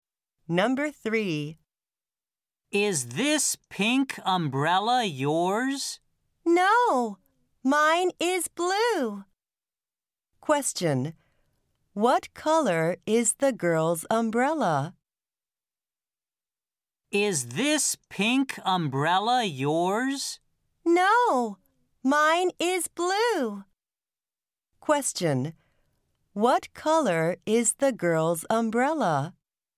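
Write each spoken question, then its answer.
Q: What color is the girl's umbrella?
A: Blue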